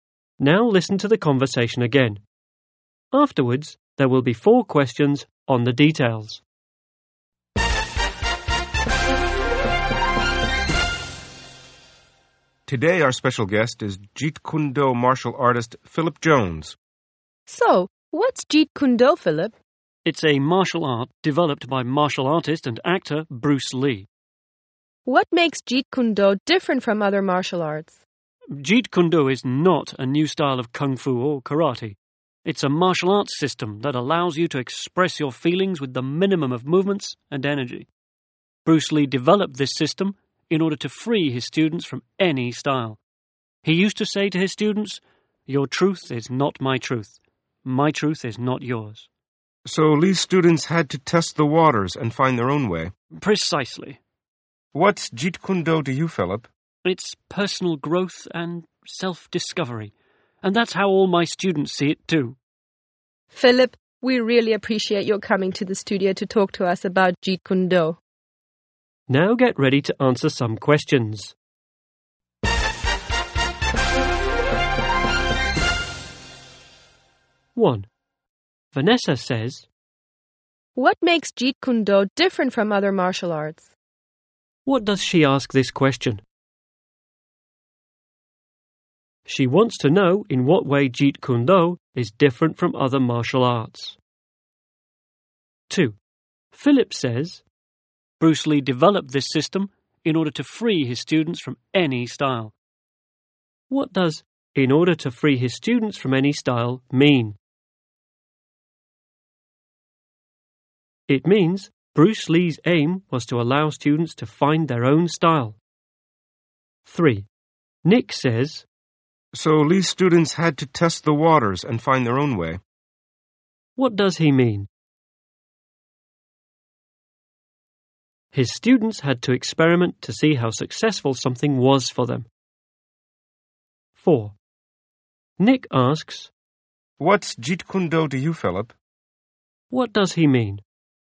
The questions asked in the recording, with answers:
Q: What does she ask this question?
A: She wants to know in what way Jeet Kune Do is different from other martial arts.

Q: What does "in order to free his students from any style" mean?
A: It means Bruce Lee's aim was to allow students to find their own style.

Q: What does he mean?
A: His students had to experiment to see how successful something was for them.